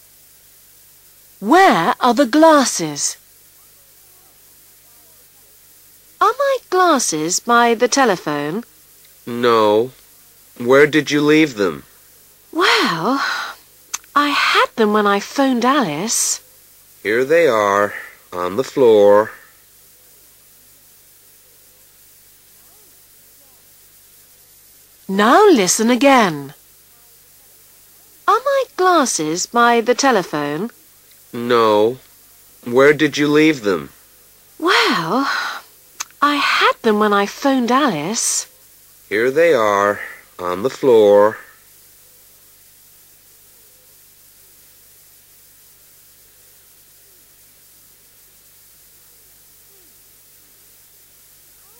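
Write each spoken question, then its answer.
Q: Where are the glasses?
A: On the floor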